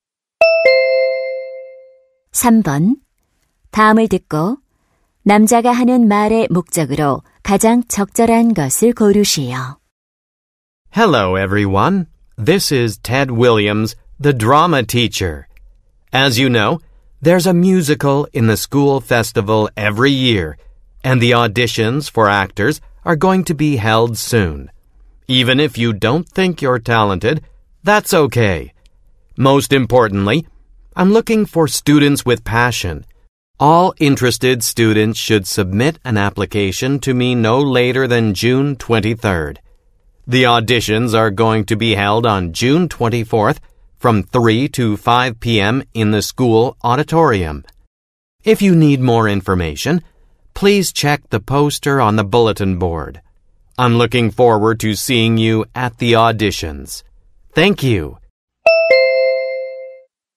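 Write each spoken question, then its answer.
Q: 다음을 듣고 남자가 하는 말의 목적으로 가장 적절한 것을 고르시오.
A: 학교 뮤지컬 배우 오디션 참가를 독려하려고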